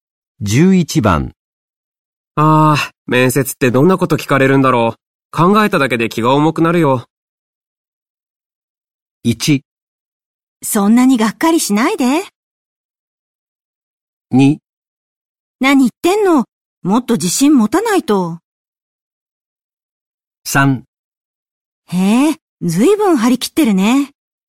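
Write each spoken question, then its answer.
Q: ああ、面接ってどんなこと聞かれるんだろう。考えただけで気が重くなるよ。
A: 2: 何言ってんの?もっと自信持たないと。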